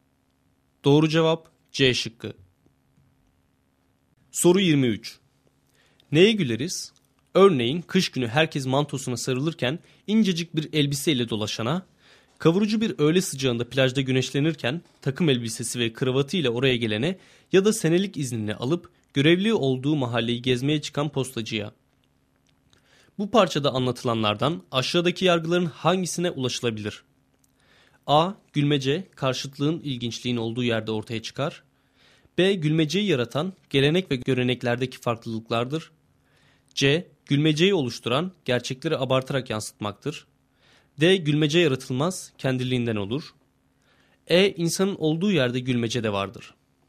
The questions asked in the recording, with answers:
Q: Bu parçada anlatılanlardan aşağıdaki yargıların hangisine ulaşılabilir?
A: Doğru cevap A şıkkı.